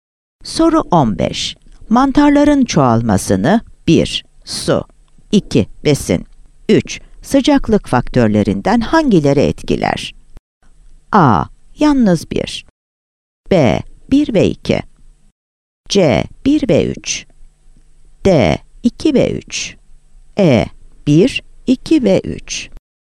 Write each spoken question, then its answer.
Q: Sıcaklık faktörlerinden hangileri etkiler?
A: Yanıt E'dir.